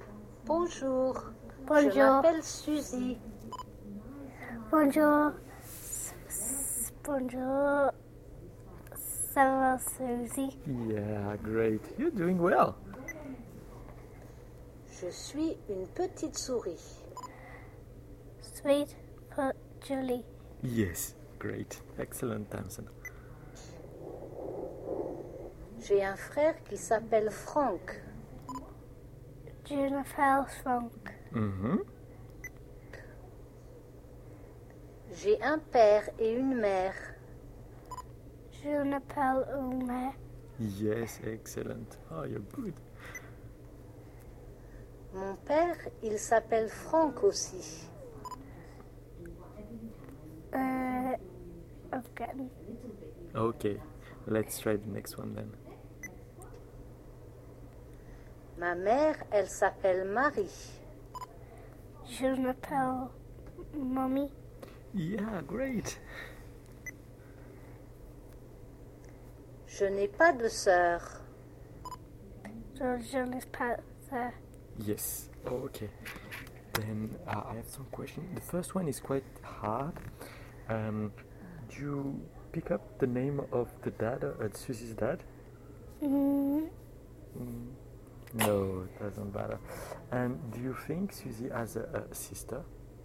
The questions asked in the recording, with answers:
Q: And do you think Susie has a sister?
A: No, she doesn't have any sister.